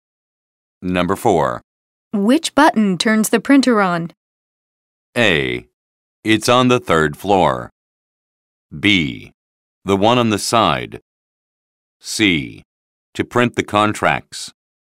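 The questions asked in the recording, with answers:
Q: Which button turns the printer on?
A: B: The one on the side.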